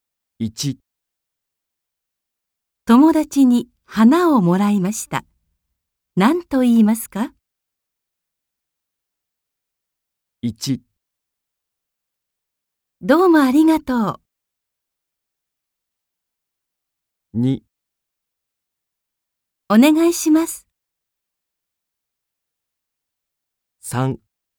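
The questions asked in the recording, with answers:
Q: 友達に花をもらいました。何と言いますか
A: 1: どうもありがとう。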